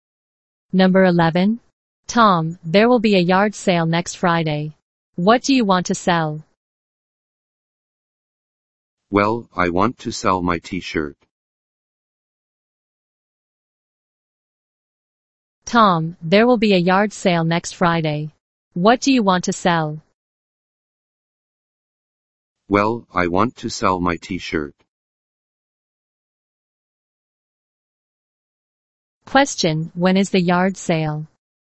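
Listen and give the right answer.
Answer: Next Friday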